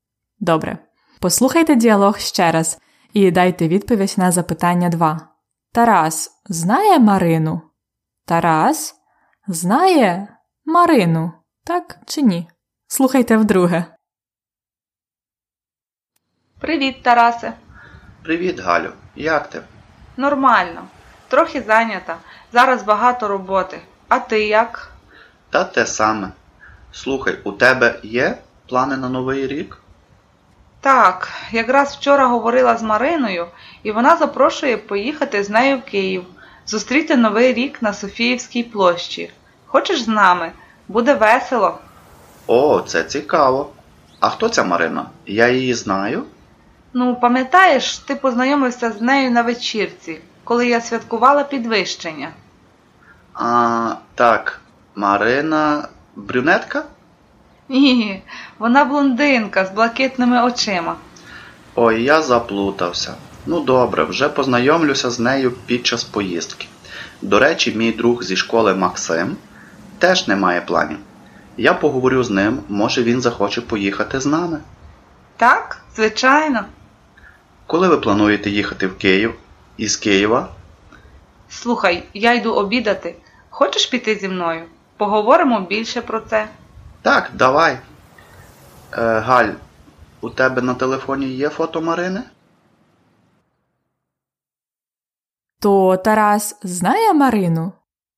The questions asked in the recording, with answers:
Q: Тарас знає Марину? Тарас Знає Марину, так чи ні?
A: Він знає Марину, але він її не пам'ятає.